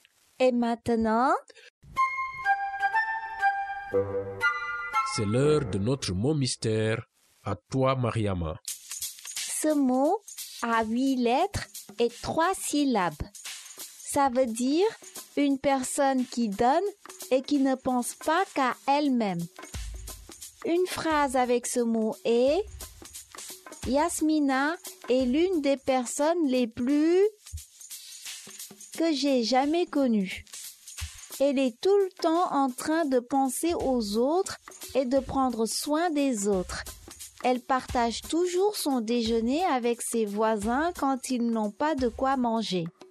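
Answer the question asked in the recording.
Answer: généreux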